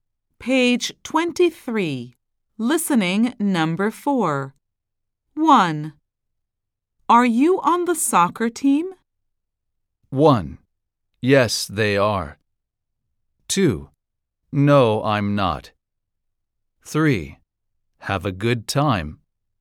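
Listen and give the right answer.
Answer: 2: No, I'm not.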